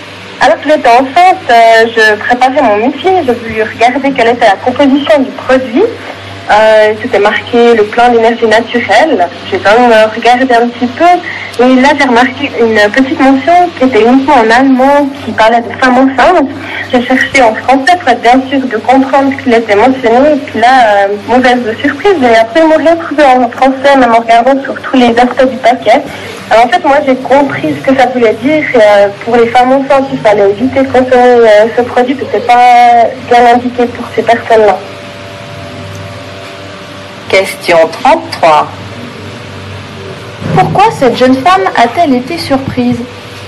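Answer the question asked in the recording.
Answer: Parce que l'avertissement pour les femmes enceintes n'était écrit qu'en allemand, pas en français.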